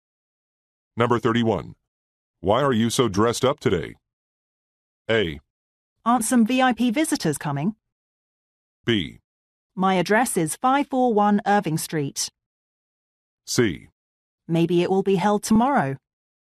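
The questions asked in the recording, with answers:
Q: Why are you so dressed up today?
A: A: Aren't some VIP visitors coming?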